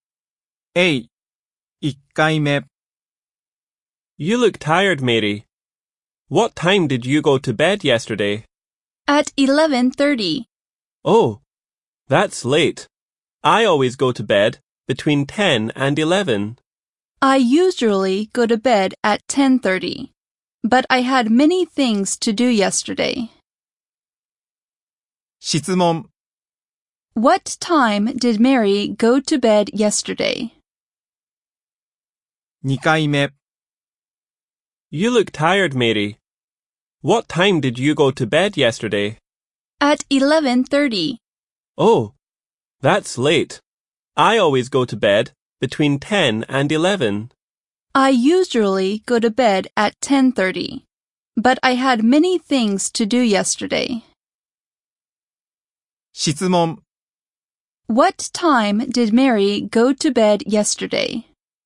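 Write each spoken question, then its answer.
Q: What time did Mary go to bed yesterday?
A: At 11:30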